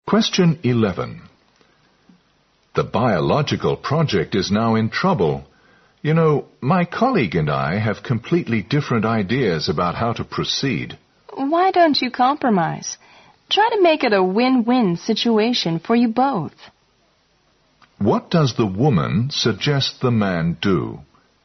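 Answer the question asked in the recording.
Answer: Reach a compromise with his colleague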